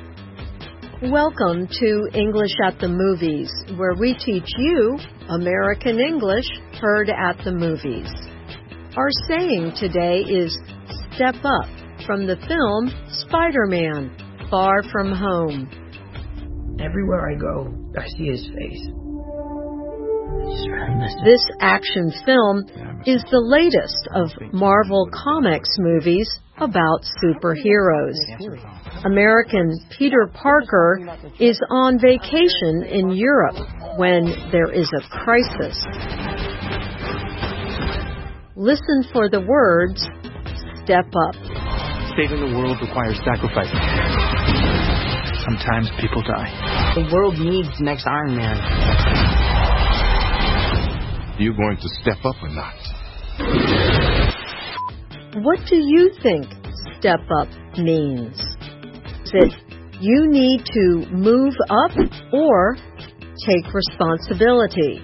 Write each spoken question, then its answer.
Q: What do you think step up means?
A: The answer is take responsibility.